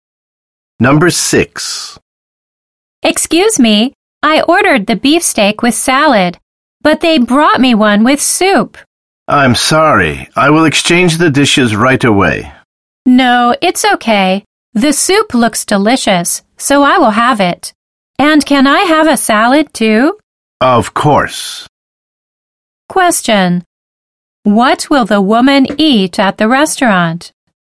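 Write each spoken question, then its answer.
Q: What will the woman eat at the restaurant?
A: Beefsteak with soup and a salad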